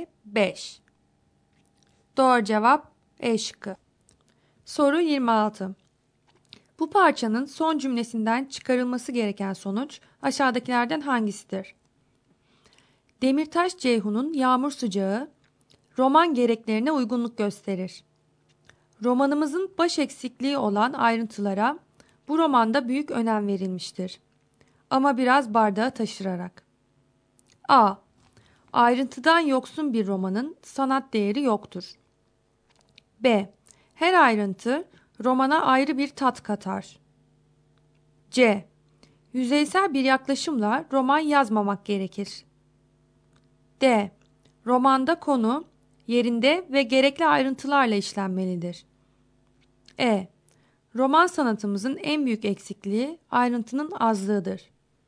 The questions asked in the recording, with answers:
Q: Bu parçanın son cümlesinden çıkarılması gereken sonuç aşağıdakilerden hangisidir?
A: Doğru cevap D şıkkı.